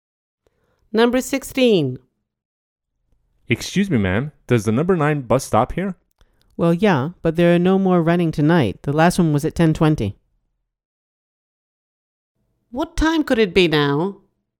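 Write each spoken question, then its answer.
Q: What time could it be now?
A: After 10:20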